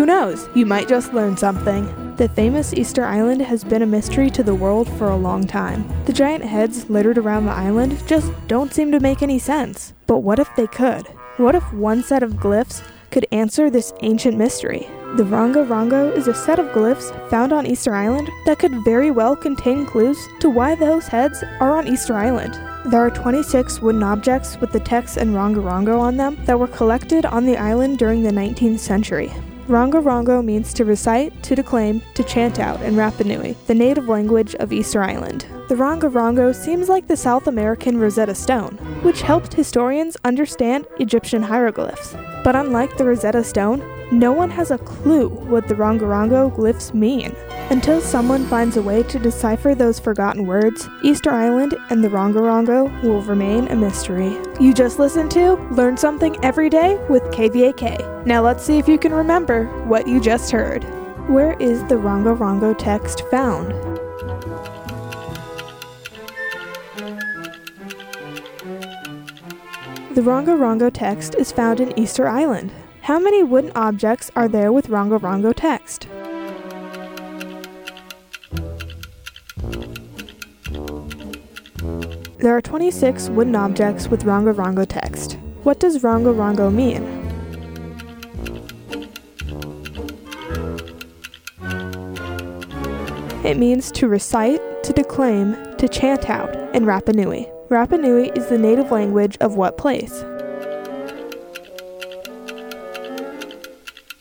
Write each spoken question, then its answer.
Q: Where is the Ranga Ranga text found?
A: The Ranga Ranga text is found in Easter Island.

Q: How many wooden objects are there with Ranga Ranga text?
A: There are 26 wooden objects with Ranga Ranga text.

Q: Rapa Nui is the native language of what place?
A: Rapa Nui is the native language of Easter Island.